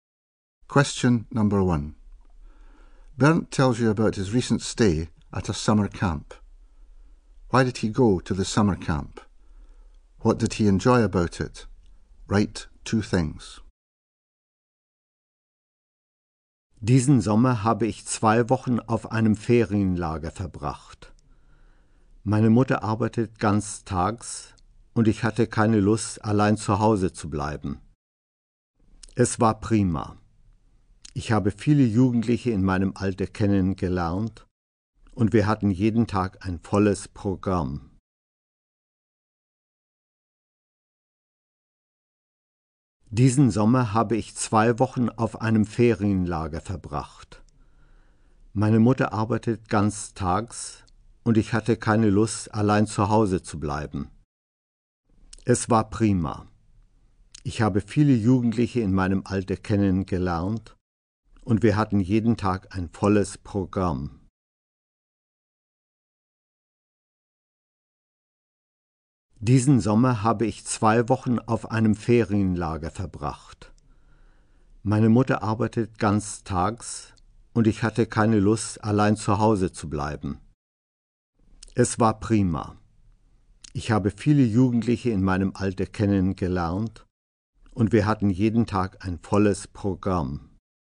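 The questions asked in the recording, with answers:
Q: Why did he go to the summer camp?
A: His mother works full time and he didn't want to stay at home alone

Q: What did he enjoy about it?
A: He met lots of young people his age; there was a full programme every day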